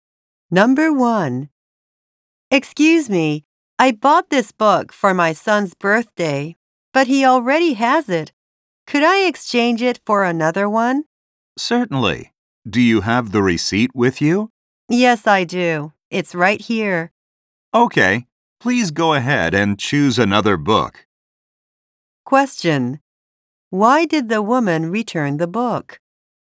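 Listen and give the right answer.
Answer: Her son already has it.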